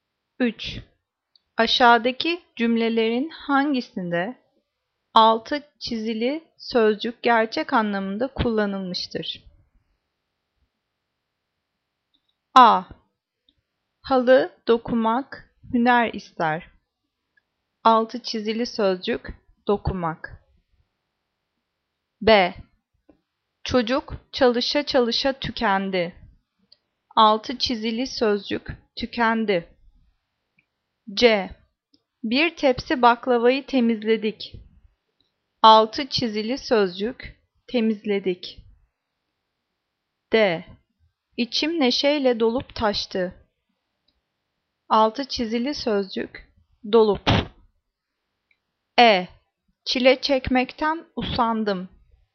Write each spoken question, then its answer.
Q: Aşağıdaki cümlelerin hangisinde altı çizili sözcük gerçek anlamında kullanılmıştır?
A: Cevap A. Halı dokumak hüner ister.